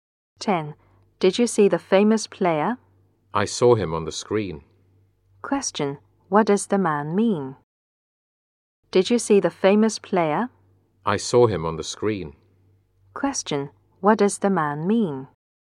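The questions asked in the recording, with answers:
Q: What does the man mean?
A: He only saw the player on TV, not in person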